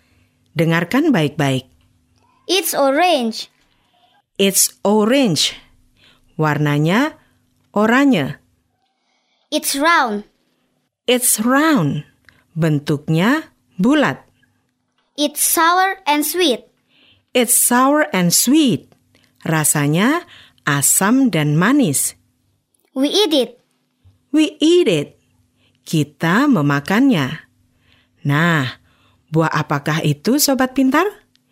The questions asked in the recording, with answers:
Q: Nah, buah apakah itu, Sobat Pintar?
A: Ya, it's an orange. Buah jeruk.